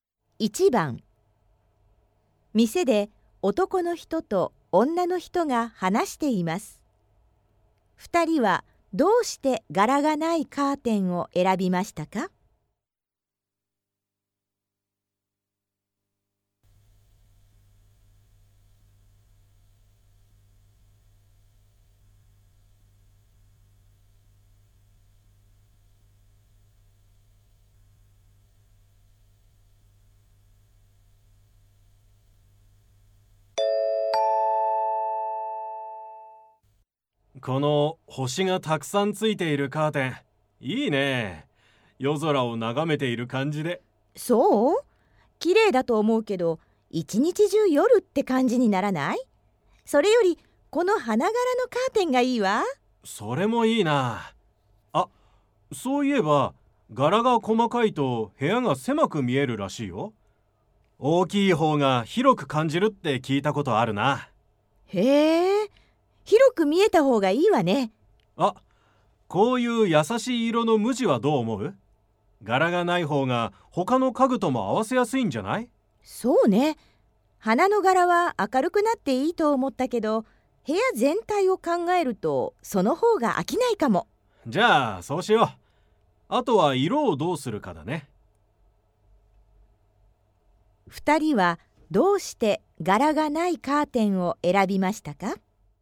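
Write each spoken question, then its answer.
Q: 二人はどうして柄がないカーテンを選びましたか?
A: 他の家具と合わせやすく、飽きないから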